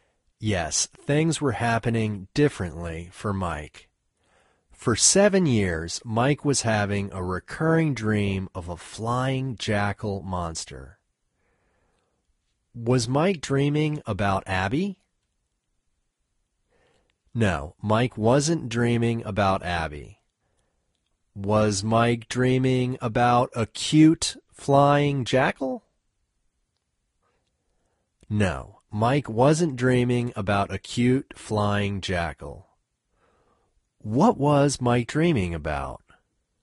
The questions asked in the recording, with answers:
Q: Was Mike dreaming about Abby?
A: No, Mike wasn't dreaming about Abby.

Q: What was Mike dreaming about?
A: Mike was dreaming about a flying jackal monster.